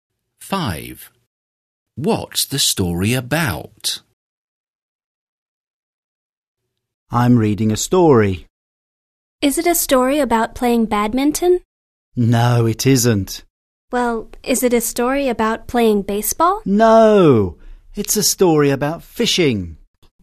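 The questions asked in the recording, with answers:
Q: What's the story about?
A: Fishing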